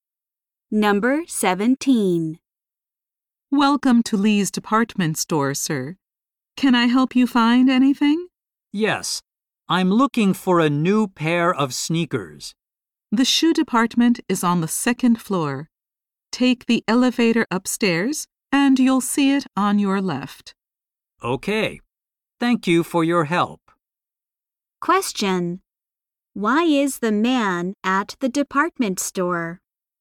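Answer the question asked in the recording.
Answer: To buy a new pair of sneakers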